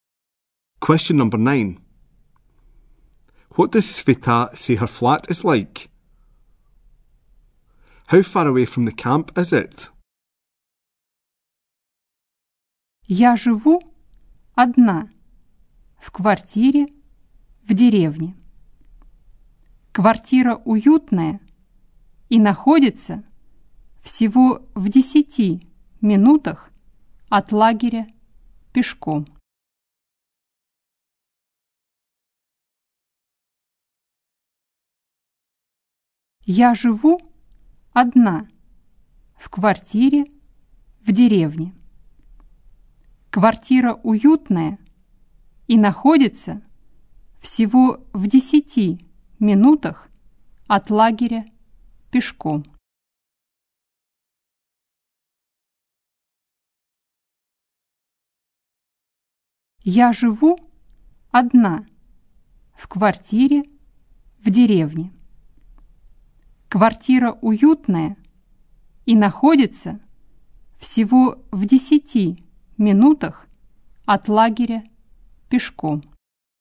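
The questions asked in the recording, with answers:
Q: What does Sveta say her flat is like?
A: Cosy

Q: How far away from the camp is it?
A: Only a 10-minute walk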